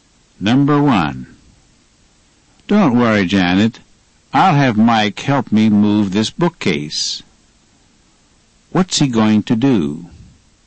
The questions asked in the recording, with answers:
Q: What's he going to do?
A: He's going to have Mike help him move the bookcase.